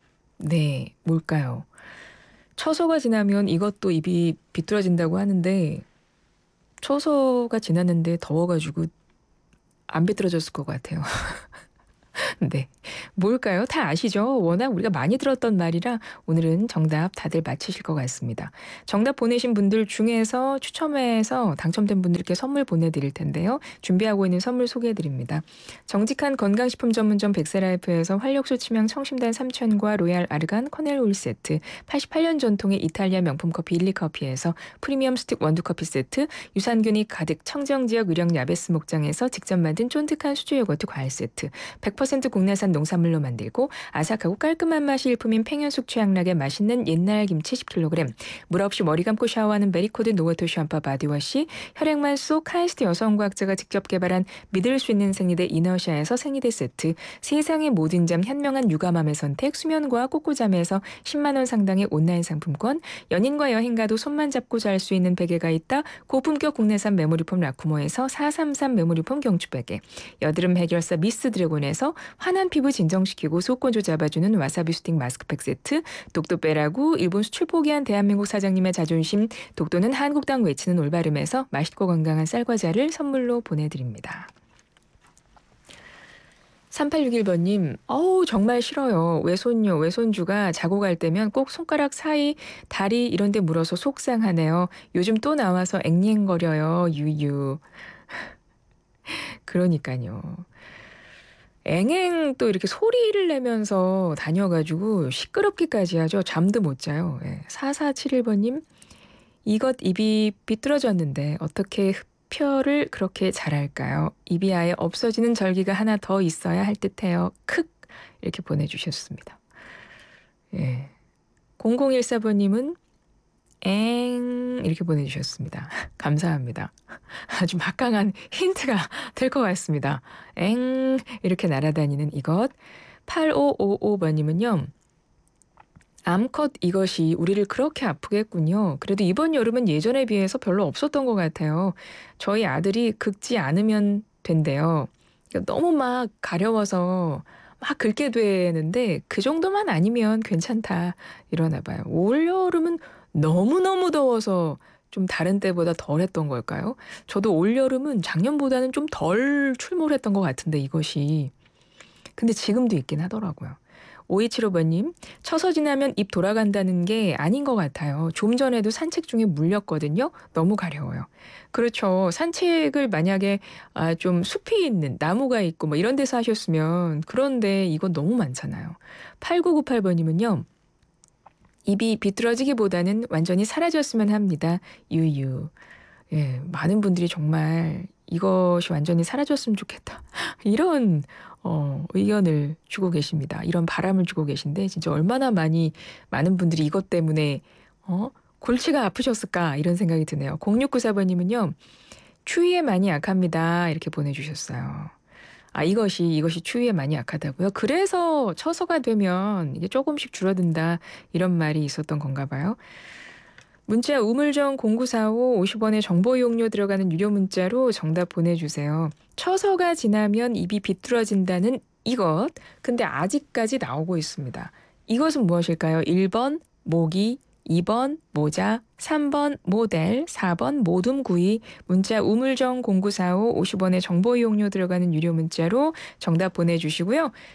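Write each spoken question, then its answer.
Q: 이것은 무엇일까요?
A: 1: 모기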